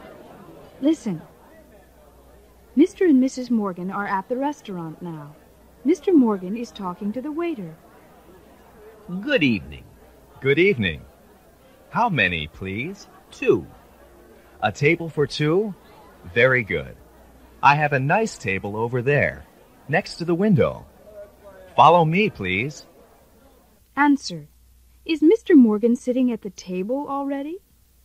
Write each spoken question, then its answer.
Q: Is Mr. Morgan sitting at the table already?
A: No, he's not.